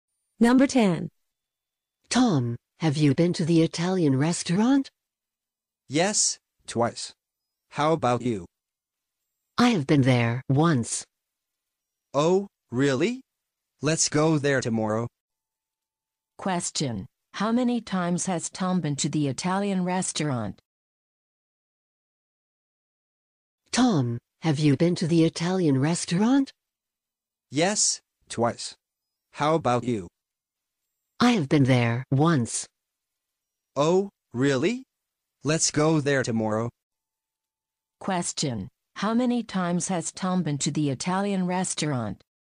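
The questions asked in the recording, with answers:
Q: How many times has Tom been to the Italian restaurant?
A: Twice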